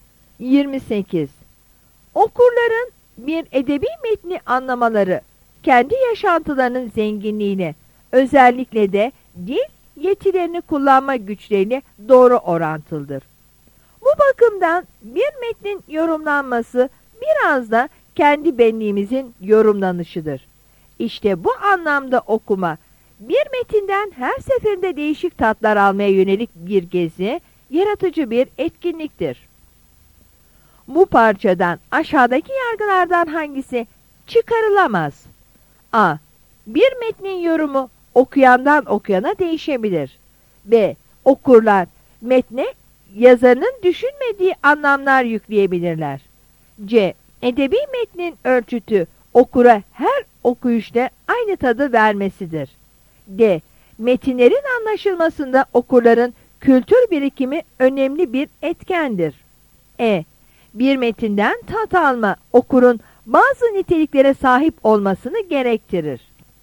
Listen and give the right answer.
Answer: Yanıt C'dir.